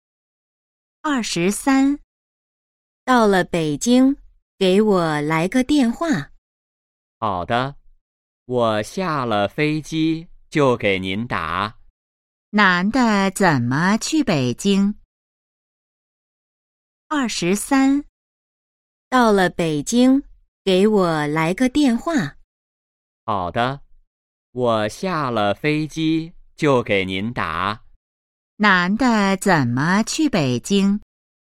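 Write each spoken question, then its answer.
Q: 男的怎么去北京?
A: 坐飞机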